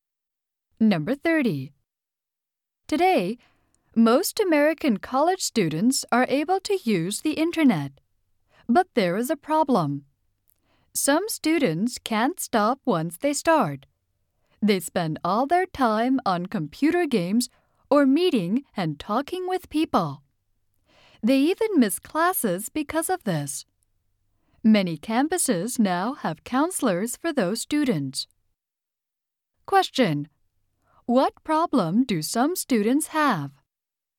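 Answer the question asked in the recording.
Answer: They can't stop using the internet once they start.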